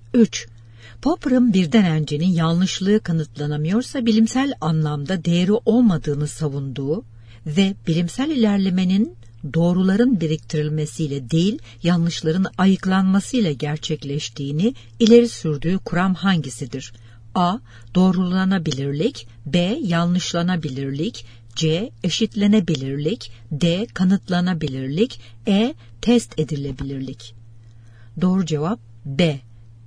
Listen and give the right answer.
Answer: Doğru cevap B.